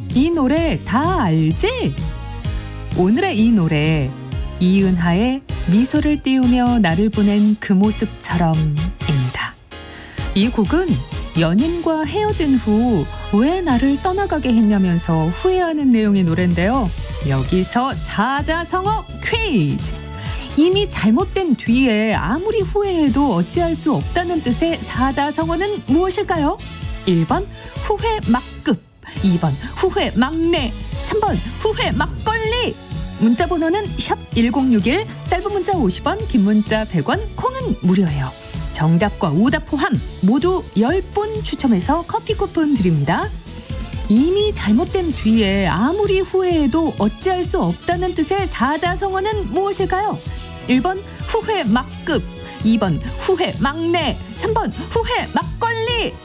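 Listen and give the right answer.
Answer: 1: 후회 막급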